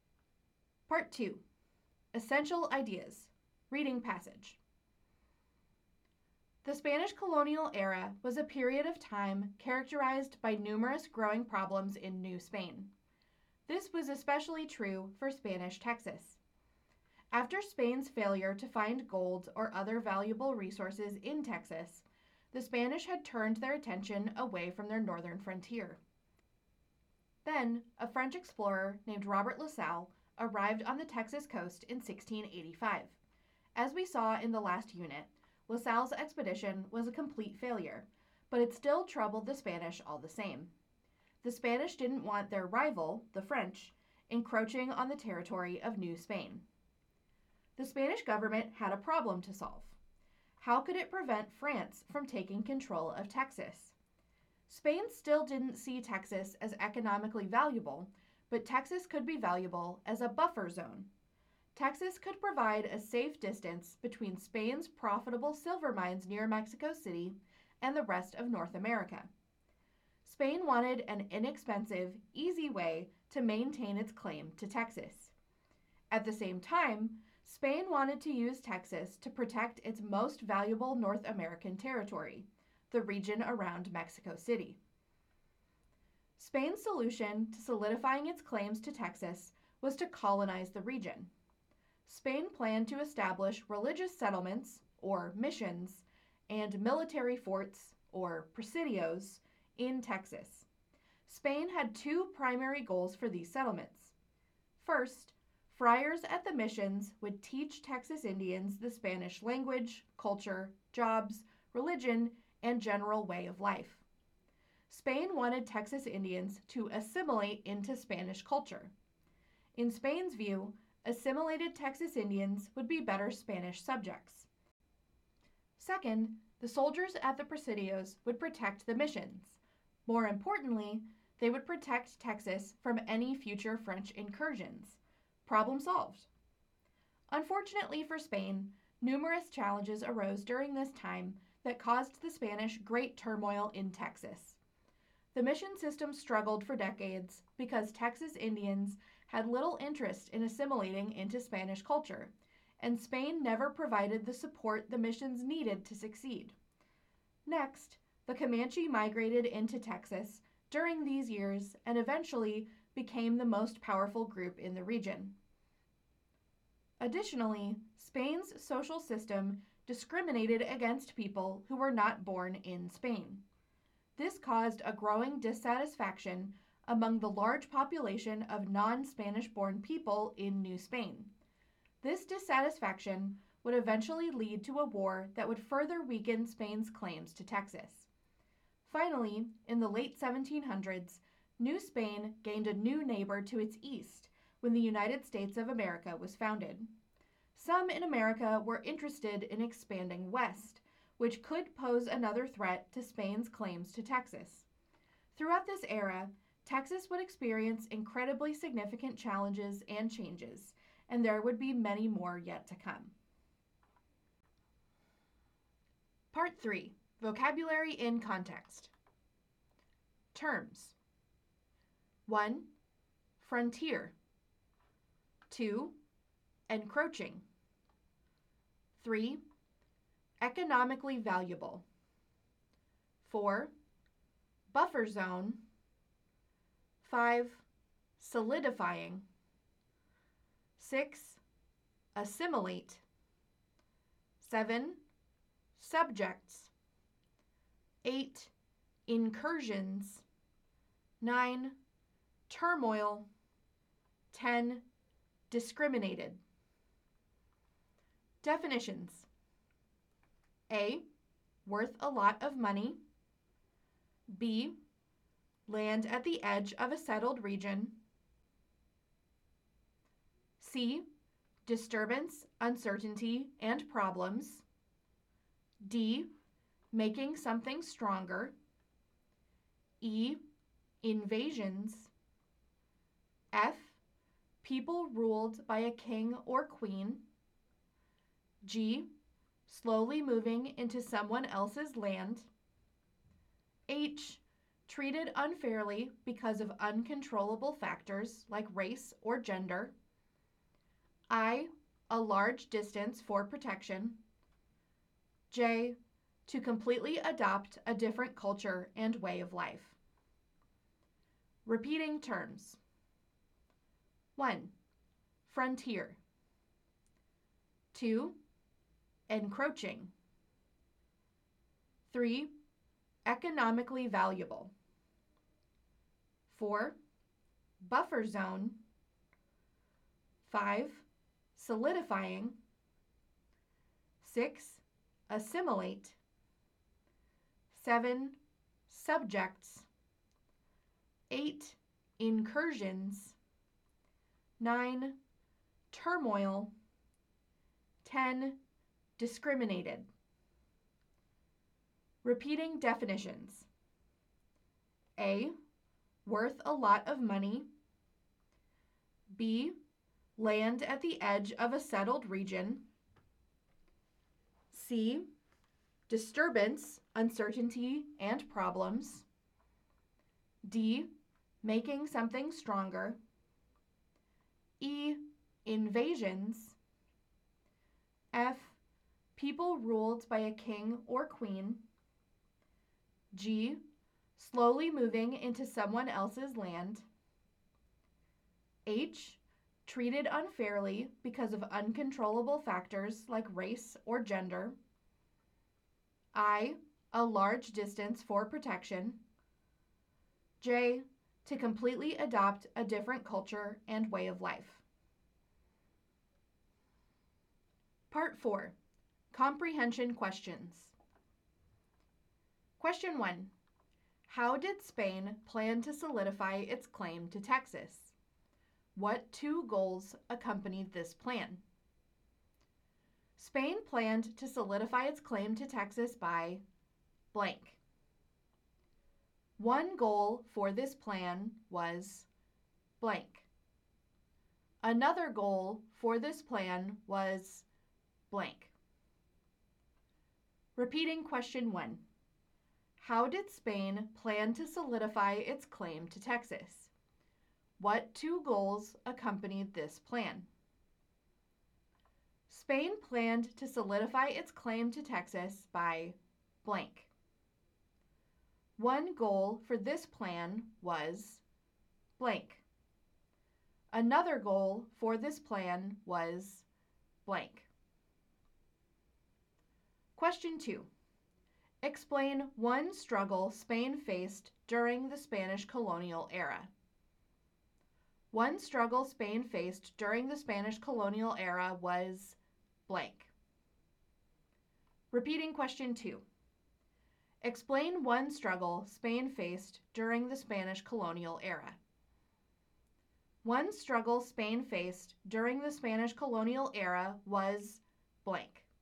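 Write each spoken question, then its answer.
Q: how did Spain plan to solidify its claim to Texas?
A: By setting up missions and presidios (military forts) in Texas. The missions would teach Texas Indians Spanish culture so they would assimilate, and the presidios would protect the missions and keep the French out.

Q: Explain one struggle Spain faced during the Spanish colonial era.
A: Texas Indians had little interest in adopting Spanish culture, so the missions struggled. Other possible answers: the powerful Comanche, unrest caused by unfair treatment of people not born in Spain, or the threat from the new United States.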